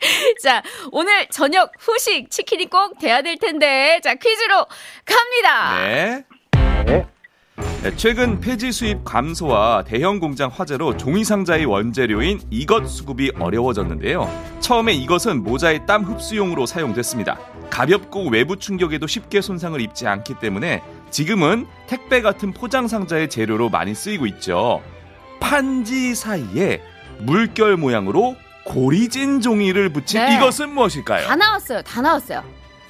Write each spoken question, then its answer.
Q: 이것은 무엇일까요?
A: 정답 골판지. 골판지!